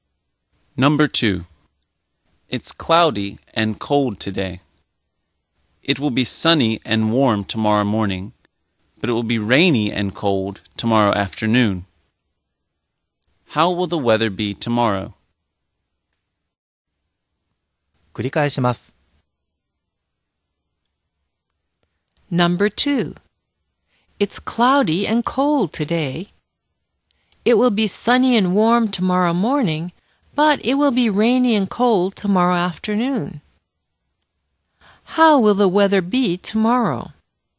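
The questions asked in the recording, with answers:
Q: How will the weather be tomorrow?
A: Sunny and warm in the morning, rainy and cold in the afternoon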